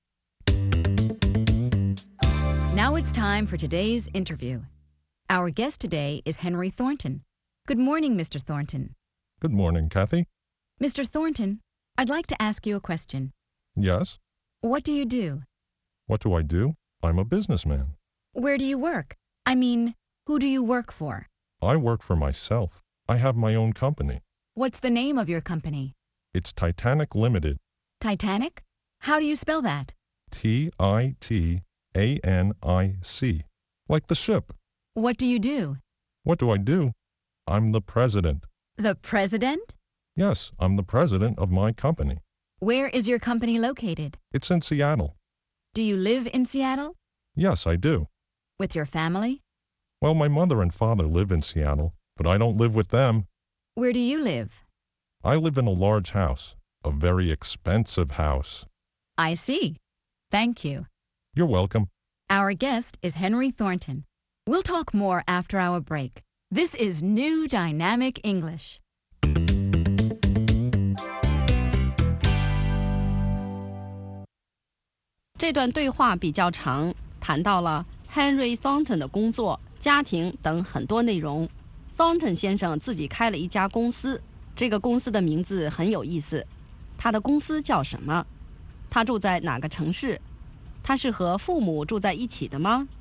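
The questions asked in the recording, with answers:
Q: 他的公司叫什么?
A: Henry 的公司叫 Titanic Limited

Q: 他住在哪个城市?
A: 西雅图(Seattle)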